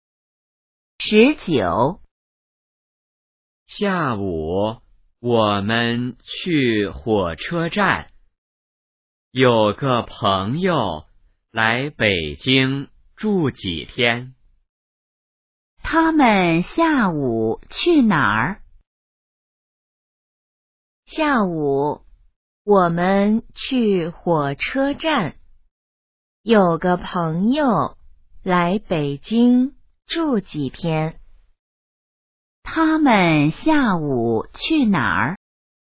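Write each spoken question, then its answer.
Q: 他们下午去哪儿?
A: 火车站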